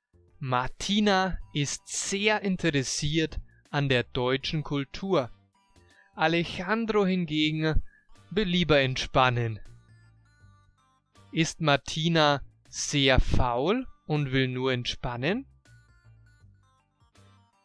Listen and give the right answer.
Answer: Nein, Martina ist nicht sehr faul und will nur entspannen.